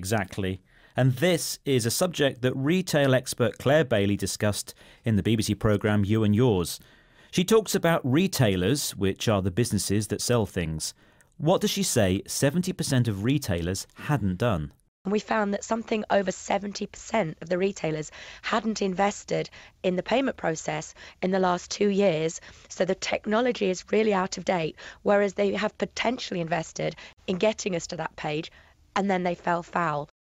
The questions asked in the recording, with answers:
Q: What does she say 70% of retailers hadn't done?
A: 70% of retailers hadn't invested in the payment process.